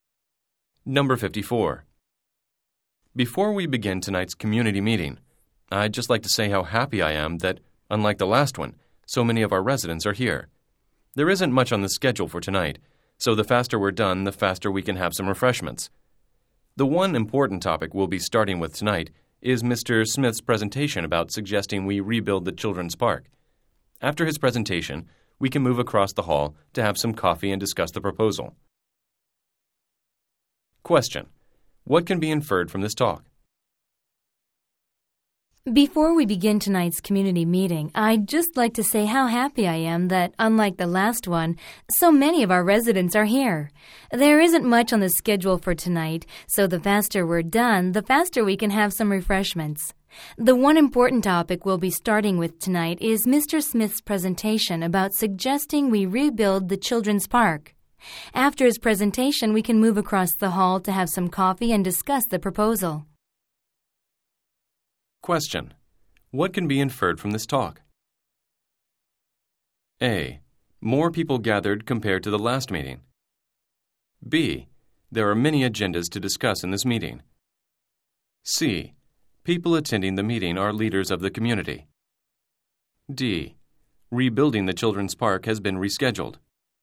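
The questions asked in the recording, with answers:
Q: What can be inferred from this talk?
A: A: More people gathered compared to the last meeting.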